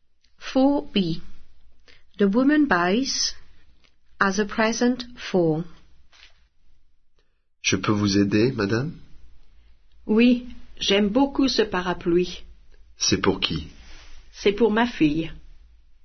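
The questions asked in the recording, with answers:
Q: The woman buys as a present for.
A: an umbrella, for her daughter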